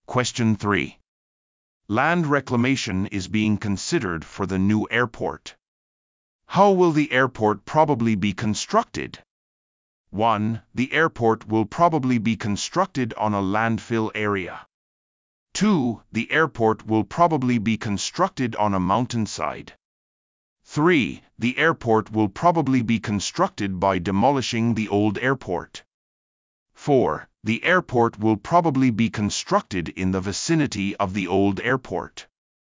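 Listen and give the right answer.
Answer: 1: The airport will probably be constructed on a landfill area.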